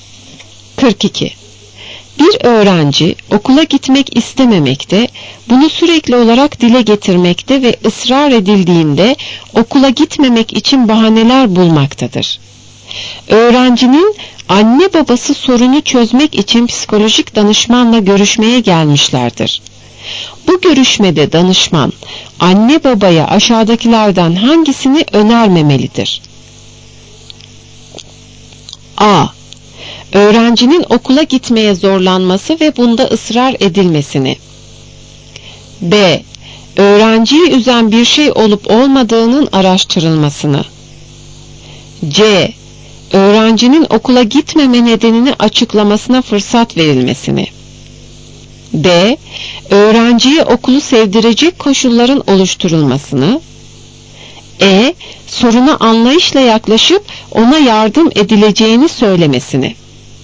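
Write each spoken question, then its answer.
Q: Bu görüşmede danışman anne babaya aşağıdakilerden hangisini önermemelidir?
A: A: Öğrencinin okula gitmeye zorlanması ve bunda ısrar edilmesini.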